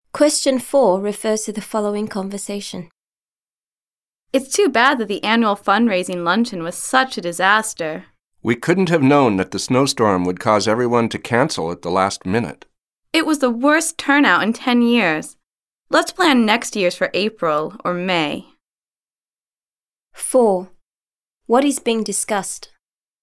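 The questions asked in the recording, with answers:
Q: What is being discussed?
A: The annual fundraising luncheon, which had a poor turnout because of a snowstorm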